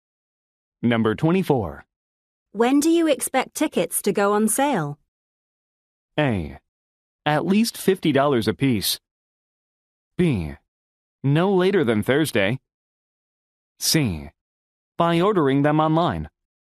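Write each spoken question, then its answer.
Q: When do you expect tickets to go on sale?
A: B: No later than Thursday.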